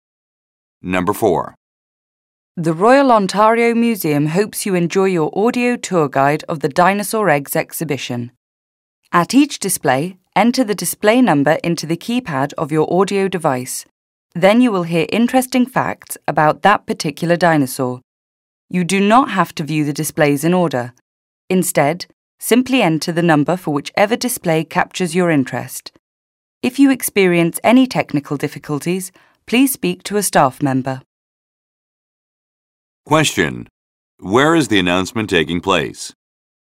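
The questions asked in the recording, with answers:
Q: Where is the announcement taking place?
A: At the Royal Ontario Museum's Dinosaur Eggs exhibition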